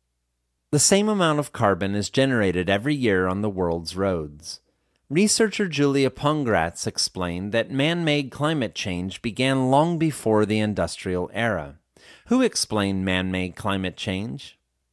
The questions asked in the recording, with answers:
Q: Who explained man-made climate change?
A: A researcher named Julia Pongratz explained man-made climate change.